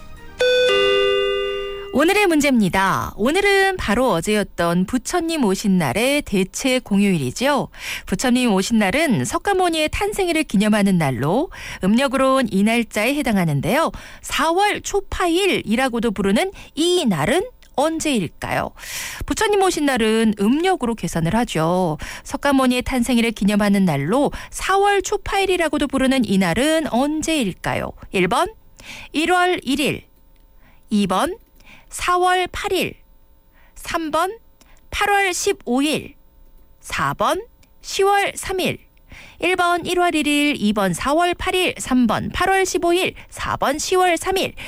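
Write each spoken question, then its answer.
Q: 4월 초파일이라고도 부르는 이 날은 언제일까요?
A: 2번: 4월 8일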